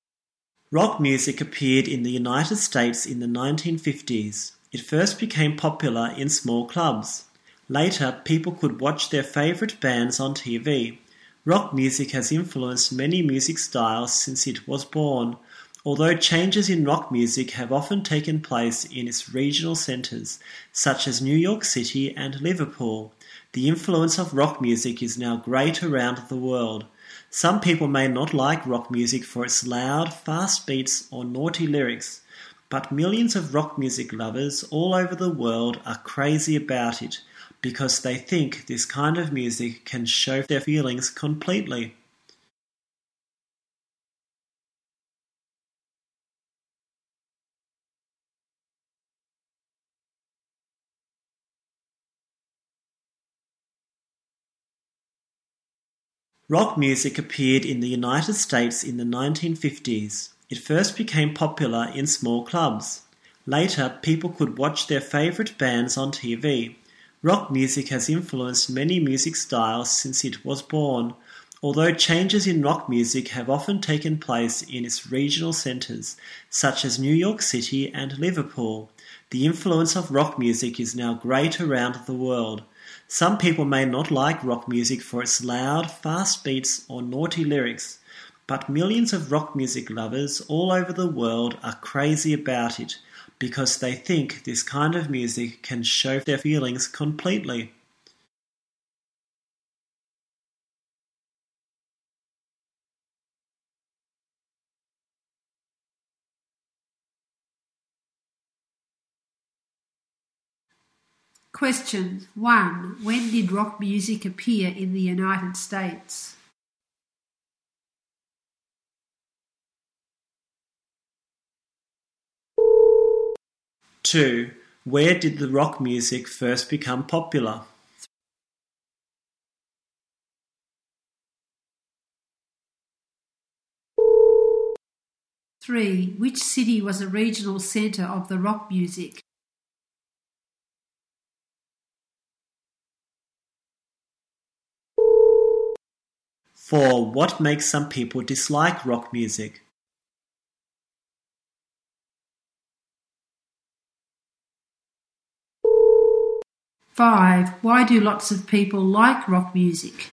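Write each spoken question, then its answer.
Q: When did rock music appear in the United States?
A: In the 1950s

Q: Where did the rock music first become popular?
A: In small clubs

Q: What makes some people dislike rock music?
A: Its loud, fast beats or naughty lyrics

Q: Why do lots of people like rock music?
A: It can show their feelings completely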